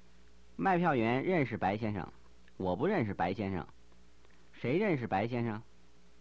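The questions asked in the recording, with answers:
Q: 谁认识白先生?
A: 卖票员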